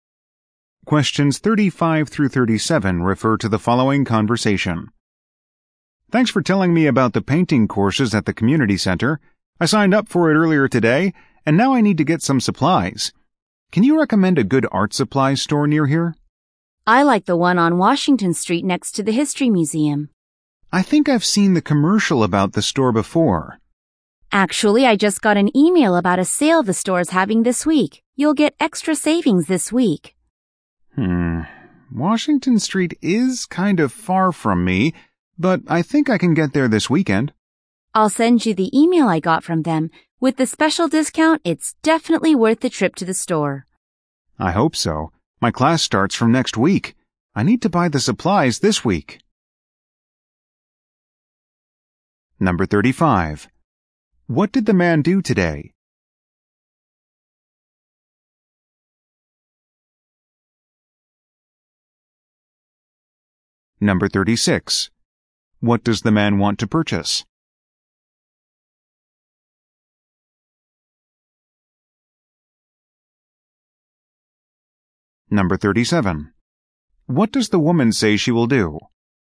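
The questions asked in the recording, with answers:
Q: What does the man want to purchase?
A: Art supplies

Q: What does the woman say she will do?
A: Send him an email about the store's sale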